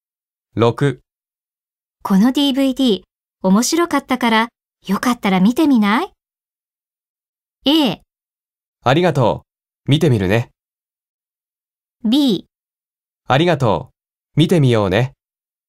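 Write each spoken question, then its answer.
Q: この DVD 面白かったからよかったら見てみない?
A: A: ありがとう、見てみるね。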